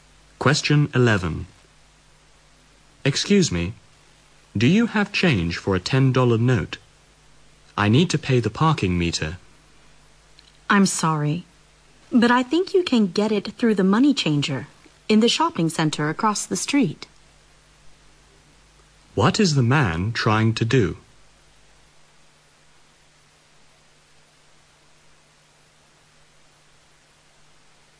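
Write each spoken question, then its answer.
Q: What is the man trying to do?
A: Get change for a $10 note to pay the parking meter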